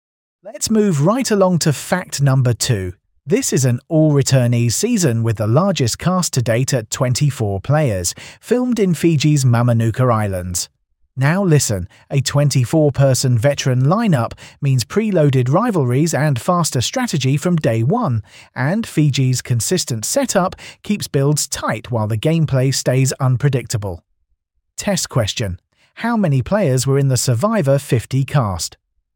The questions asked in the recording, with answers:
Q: How many players were in the Survivor 50 cast?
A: 24.